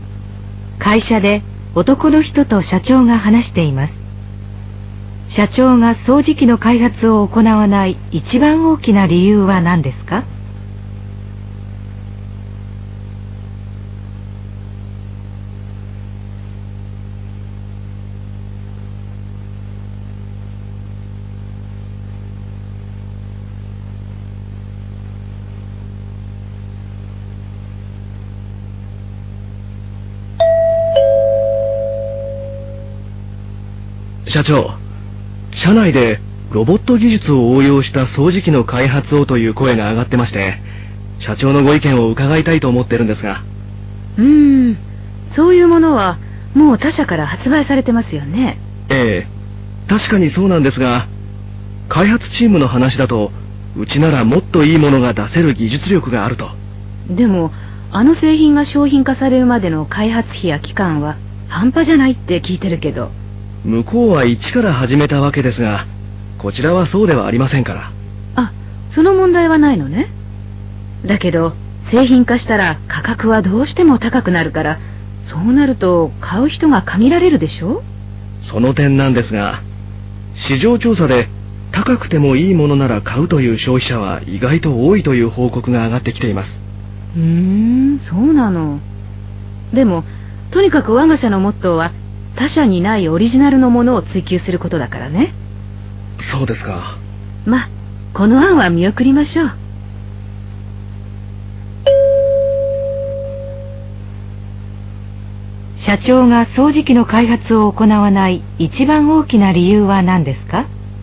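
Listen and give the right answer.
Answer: 他社がすでに発売していて、他社にないオリジナルのものではないから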